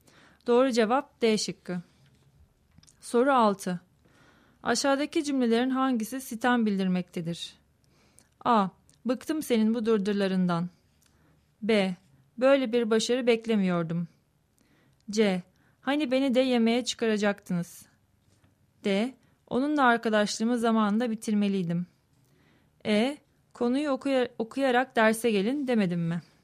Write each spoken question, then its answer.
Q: Aşağıdaki cümlelerin hangisi sitem bildirmektedir?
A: Doğru cevap C şıkkı.